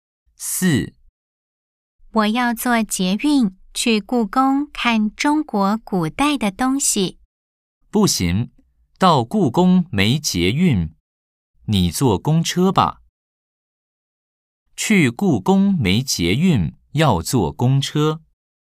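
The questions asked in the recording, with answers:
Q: 去故宫没捷运,要坐公车。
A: O (对)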